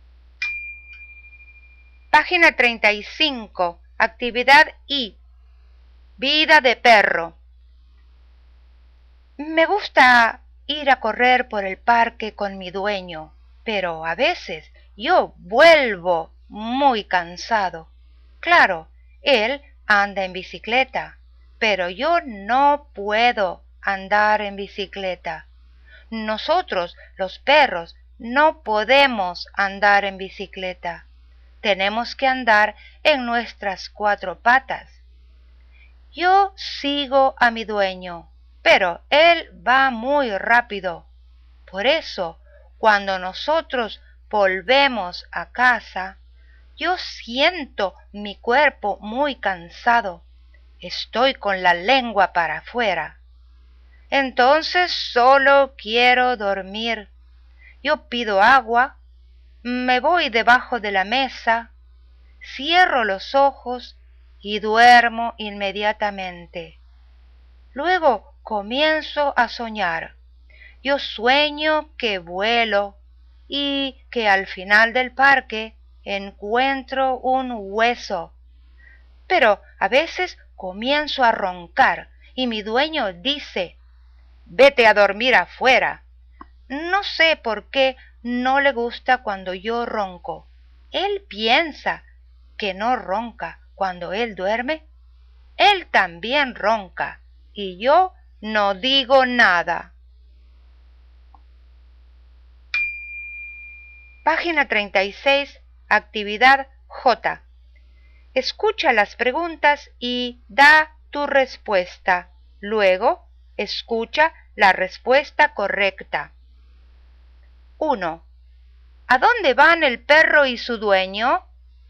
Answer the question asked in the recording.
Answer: Van al parque.